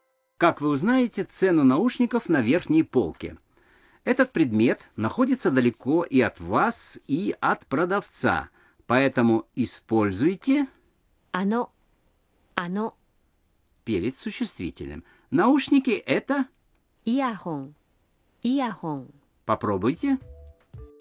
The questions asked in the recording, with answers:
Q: Как вы узнаете цену наушников на верхней полке?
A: Сумимасен, ано иахон ва икура десу ка?